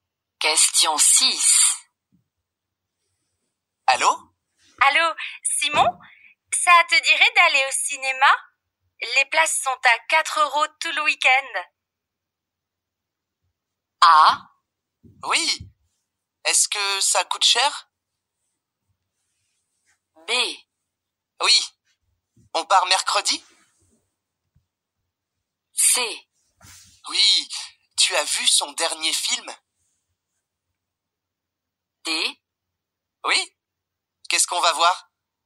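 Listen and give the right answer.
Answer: D: Oui. Qu'est-ce qu'on va voir ?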